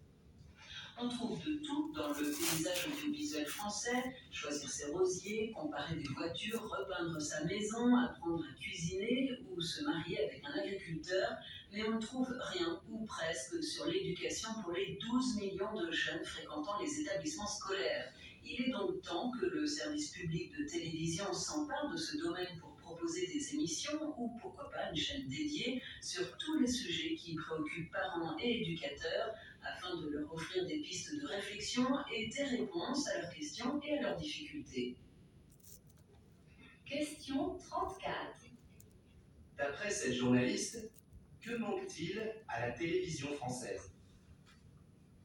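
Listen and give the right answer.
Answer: Des émissions sur l'éducation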